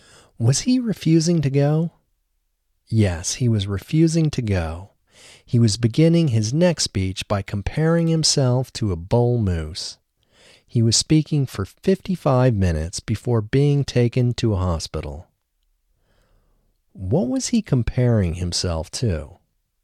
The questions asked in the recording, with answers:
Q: What was he comparing himself to?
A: He was comparing himself to a bull moose.